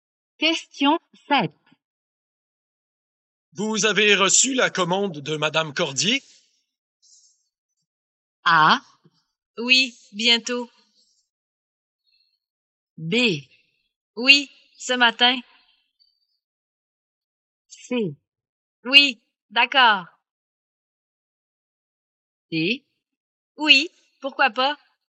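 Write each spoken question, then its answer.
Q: Vous avez reçu la commande de Madame Cordier?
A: B: Oui, ce matin.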